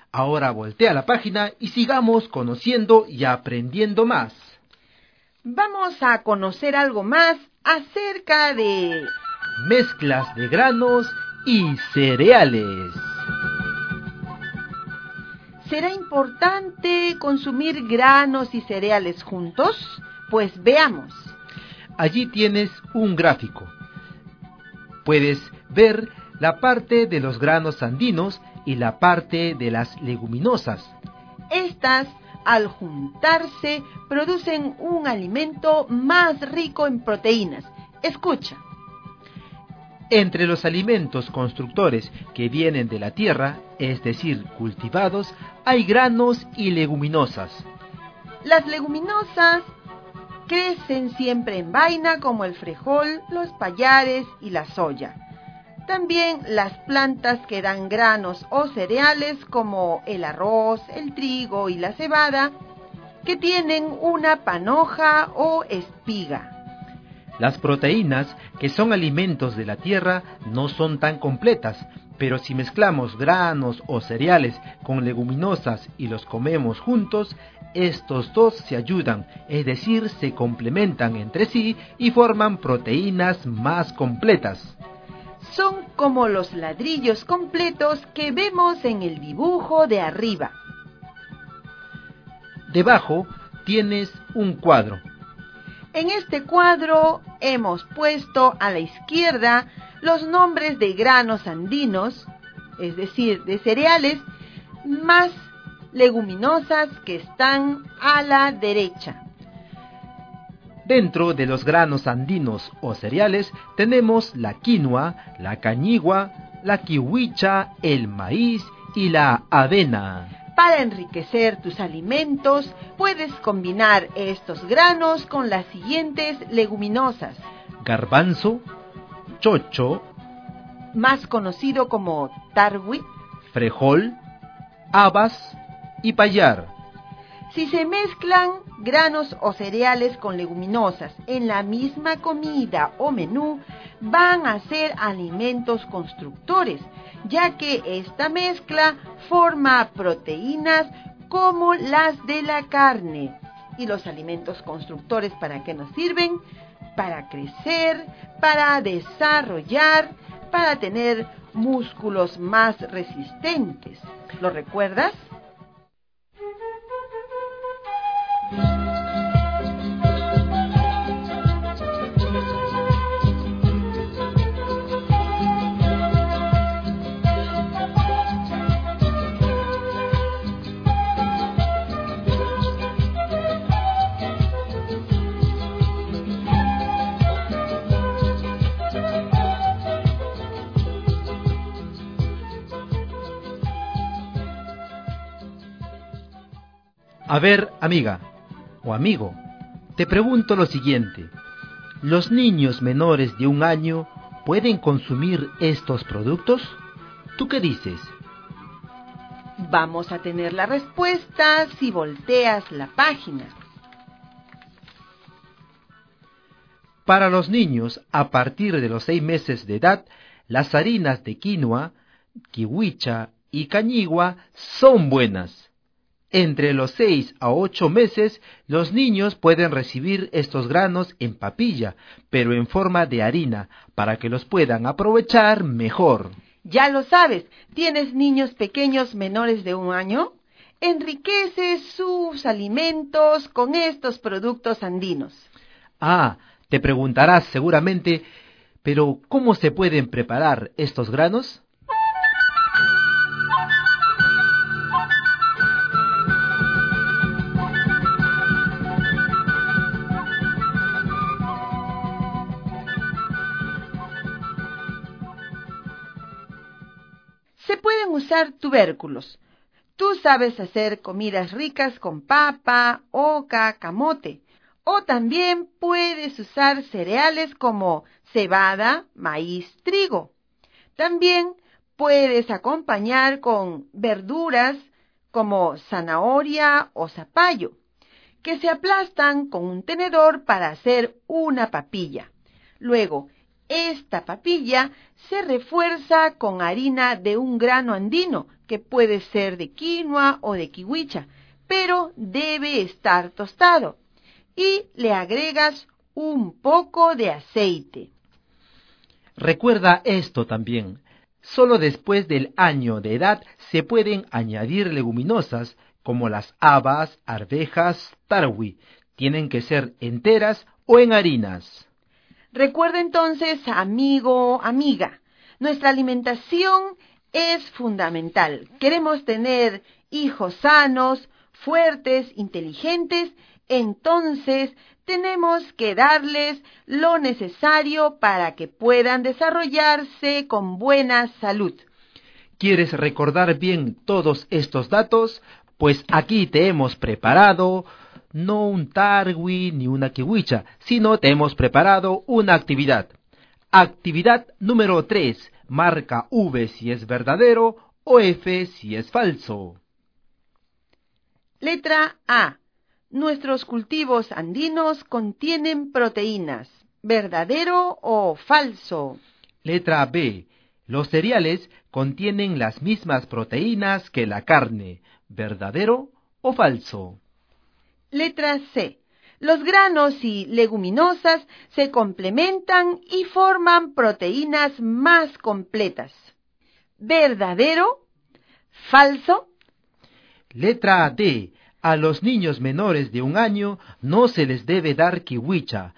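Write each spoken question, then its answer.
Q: Letra A. Nuestros cultivos andinos contienen proteínas.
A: Verdadero

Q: Letra B. Los cereales contienen las mismas proteínas que la carne.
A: Falso

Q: Letra C. Los granos y leguminosas se complementan y forman proteínas más completas.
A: Verdadero

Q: Letra D. A los niños menores de un año no se les debe dar kiwicha.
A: Falso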